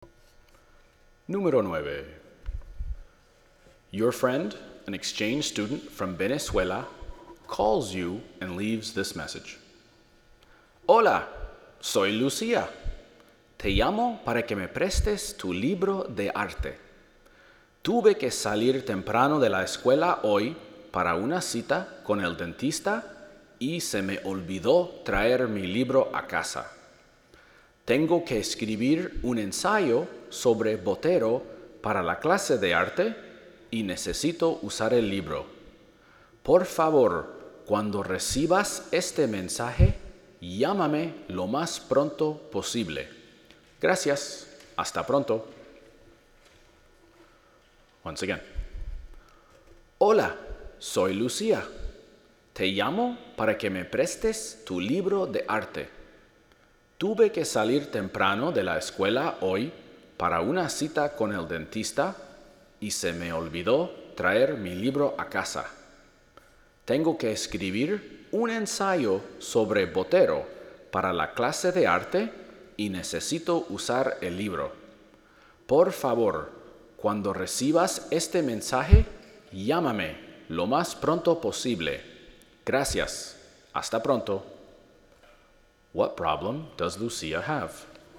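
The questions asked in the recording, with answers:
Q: What problem does Lucía have?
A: She forgot to bring her art book home and needs it for an essay on Botero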